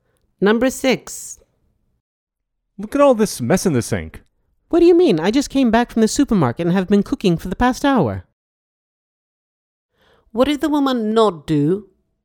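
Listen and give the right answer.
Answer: The dishes (clean the sink)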